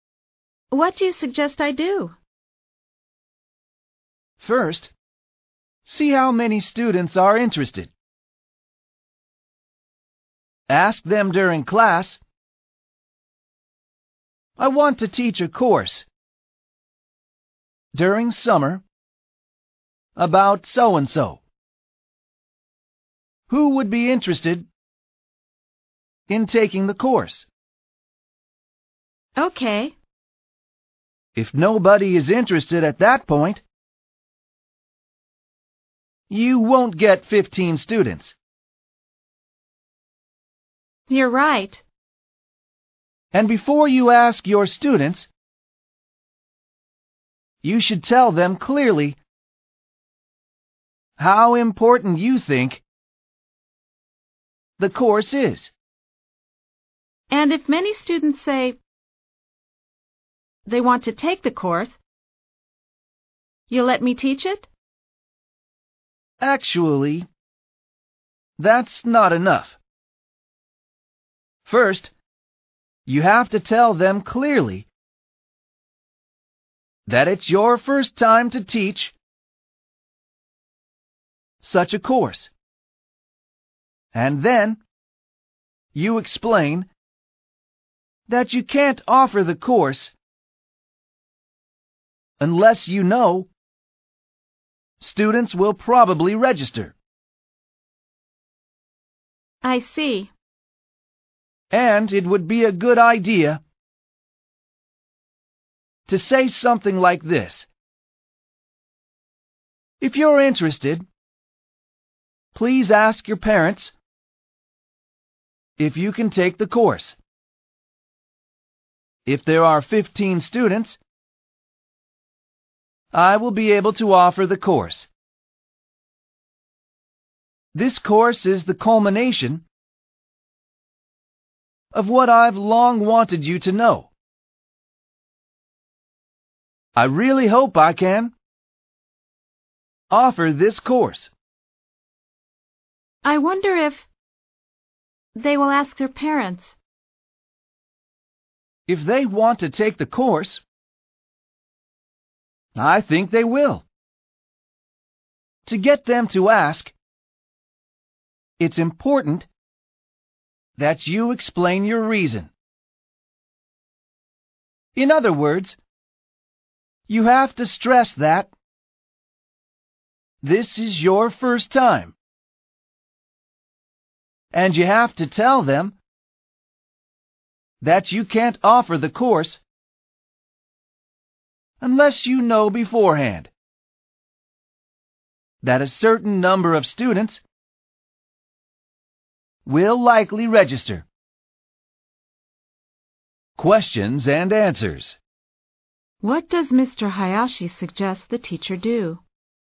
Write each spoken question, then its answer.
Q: What does Mr. Hayashi suggest the teacher do?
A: See how many students are interested.